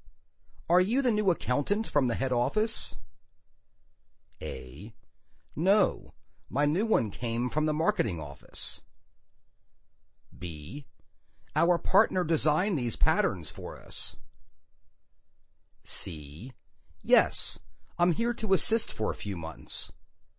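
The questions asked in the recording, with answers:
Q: Are you the new accountant from the head office?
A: C: Yes, I'm here to assist for a few months.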